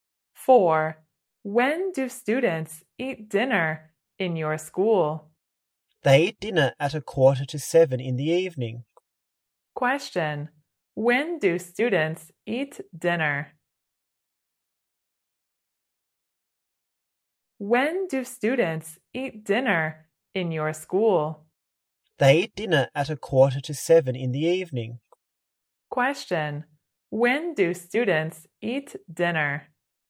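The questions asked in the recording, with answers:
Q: when do students eat dinner?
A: At 6:45 in the evening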